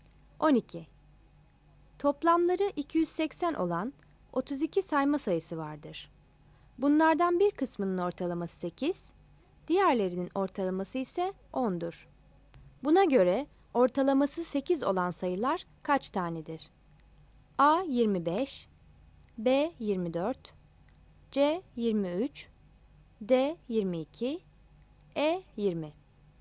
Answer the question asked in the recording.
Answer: Yanıt E'dir.